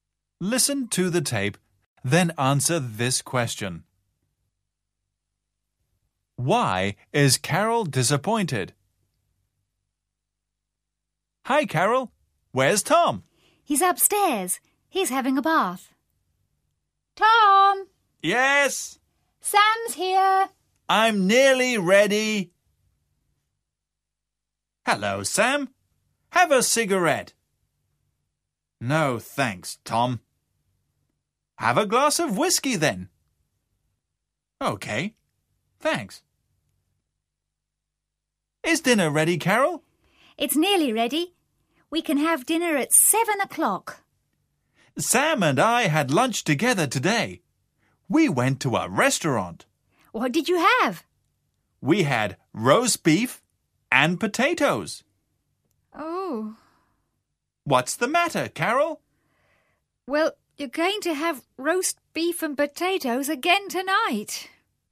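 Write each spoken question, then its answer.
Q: Why is Carol disappointed?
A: Because Tom and Sam already had roast beef and potatoes for lunch, and she is serving the same for dinner.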